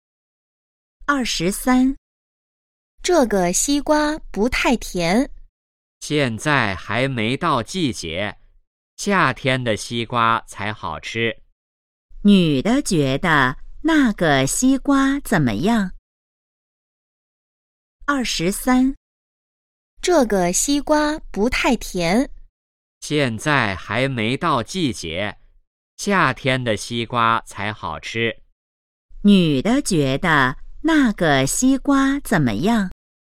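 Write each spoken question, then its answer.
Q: 女的觉得那个西瓜怎么样?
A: 不太甜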